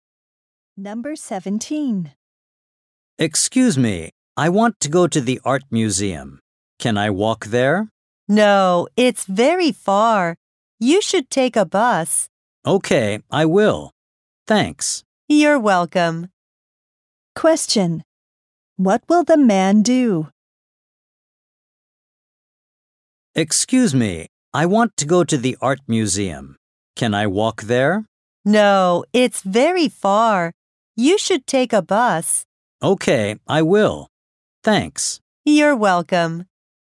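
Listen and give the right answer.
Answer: Take a bus to the art museum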